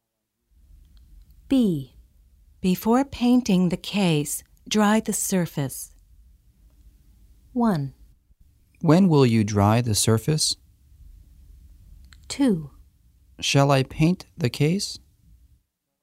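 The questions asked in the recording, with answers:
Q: When will you dry the surface?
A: Before painting the case.

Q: Shall I paint the case?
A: Not yet; dry the surface first.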